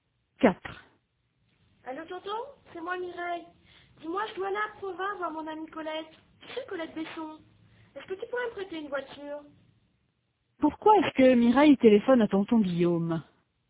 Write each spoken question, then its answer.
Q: Pourquoi est-ce que Mireille téléphone à tonton Guillaume?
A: Pour lui emprunter une voiture.